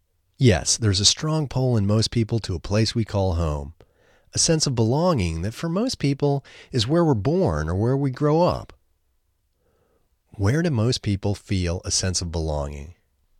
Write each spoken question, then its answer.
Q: Where do most people feel a sense of belonging?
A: Most people feel a sense of belonging where we're born or where we grow up.